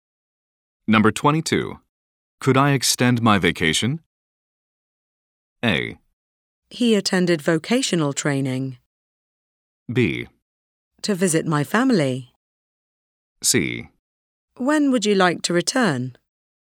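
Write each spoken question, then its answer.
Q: Could I extend my vacation?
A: C: When would you like to return?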